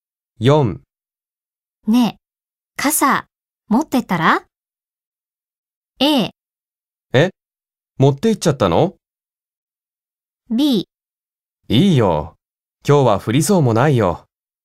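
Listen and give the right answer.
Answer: B: いいよ、今日は降りそうもないよ。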